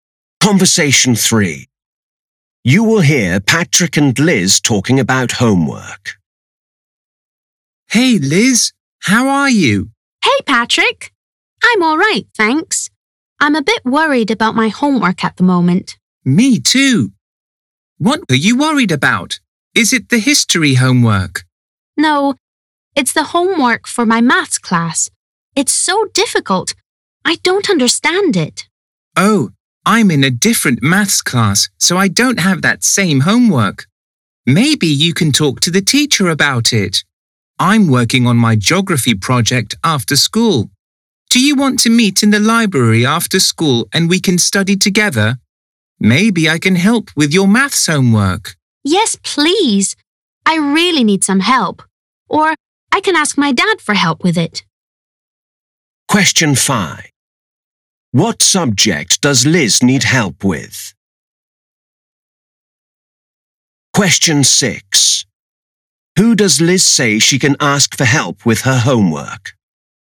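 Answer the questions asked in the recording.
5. Maths
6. Her dad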